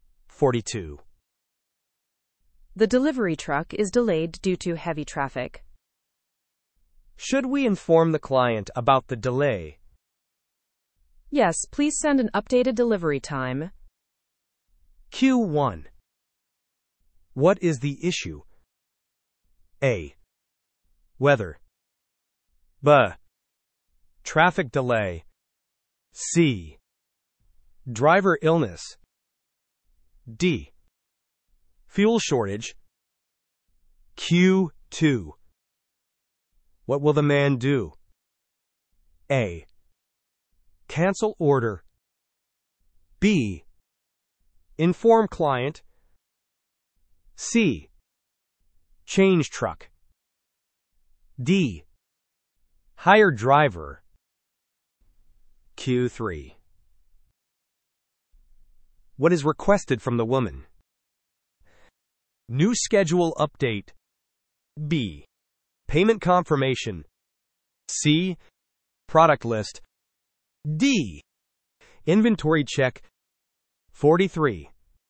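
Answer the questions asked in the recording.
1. B: Traffic delay.
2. B: Inform client.
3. A: New schedule update.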